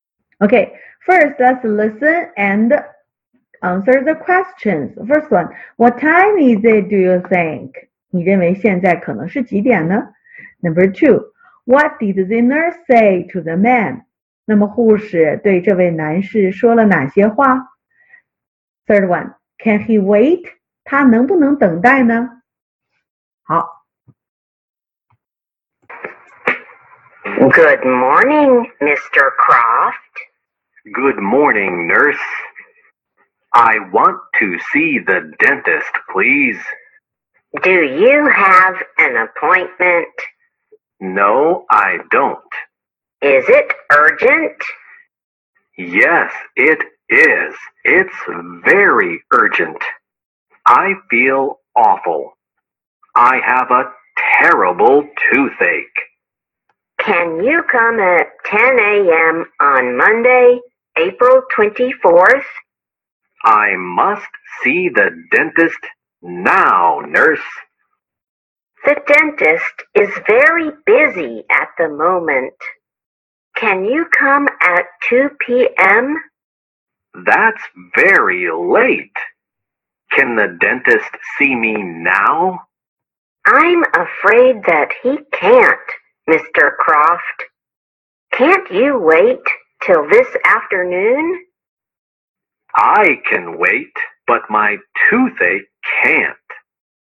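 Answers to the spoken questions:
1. Yes, it's in the morning, maybe 10, maybe 11, but not at the noon.
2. Do you have an appointment? Is it urgent? Can you come at 2 p.m.? Can't you wait till this afternoon?
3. He can wait, but his toothache can't.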